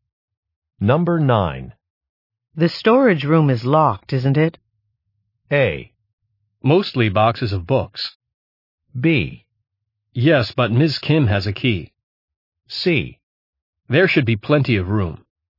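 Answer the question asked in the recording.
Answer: B: Yes, but Ms. Kim has a key.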